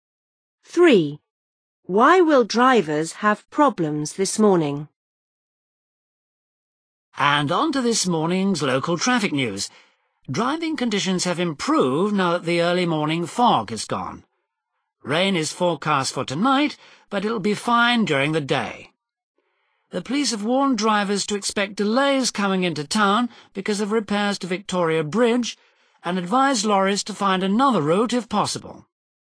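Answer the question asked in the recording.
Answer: repairs to Victoria Bridge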